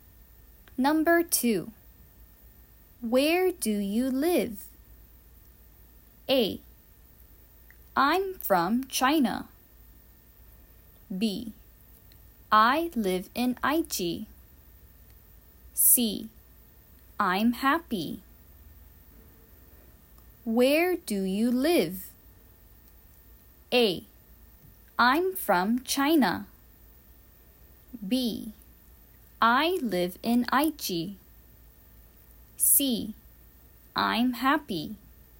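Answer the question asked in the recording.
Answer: B: I live in Aichi.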